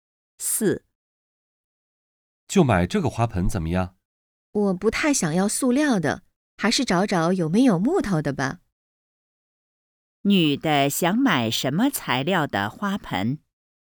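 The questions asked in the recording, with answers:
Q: 女的想买什么材料的花盆?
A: 木头的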